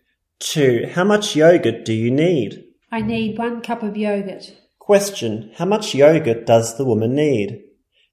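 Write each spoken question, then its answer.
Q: how much yogurt does the woman need?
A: 1 cup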